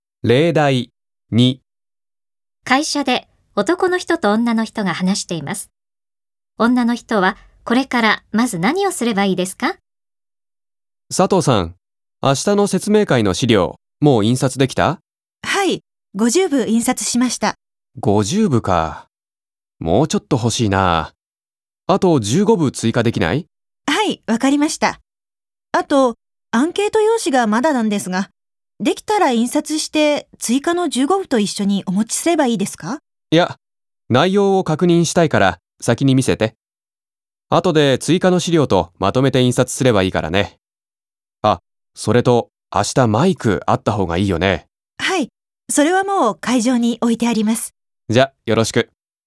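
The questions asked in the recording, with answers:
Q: 女の人はこれからまず何をすればいいですか?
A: アンケート用紙を男の人に見せる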